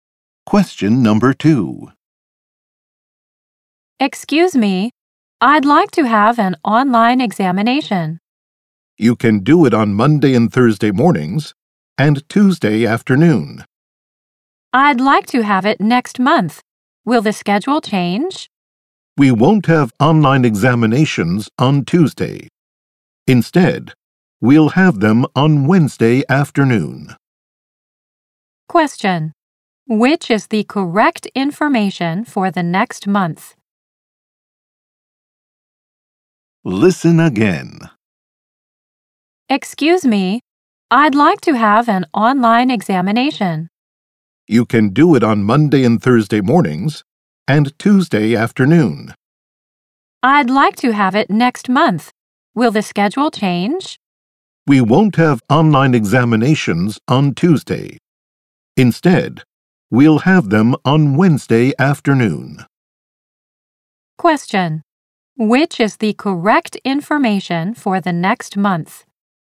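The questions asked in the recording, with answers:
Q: Which is the correct information for the next month?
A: Exams on Monday and Thursday mornings and Wednesday afternoon (none on Tuesday)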